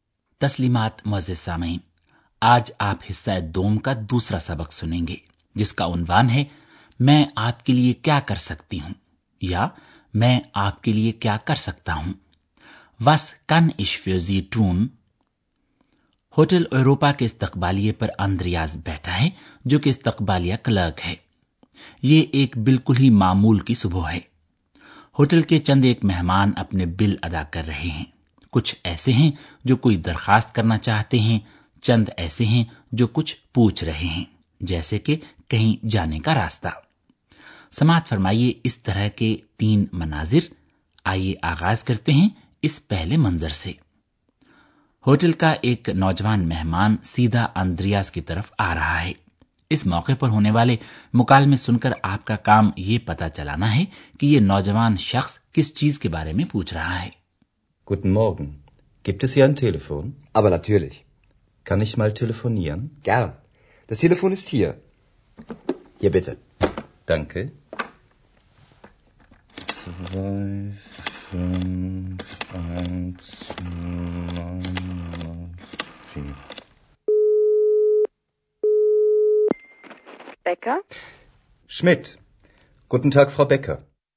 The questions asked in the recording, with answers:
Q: اس موقع پر ہونے والے مکالمے سن کر آپ کا کام یہ پتا چلانا ہے کہ یہ نوجوان شخص کس چیز کے بارے میں پوچھ رہا ہے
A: نوجوان شخص ٹیلی فون کے بارے میں پوچھ رہا تھا